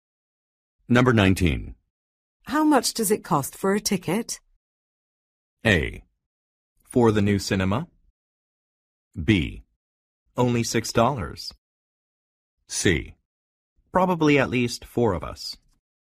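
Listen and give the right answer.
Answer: B: Only $6.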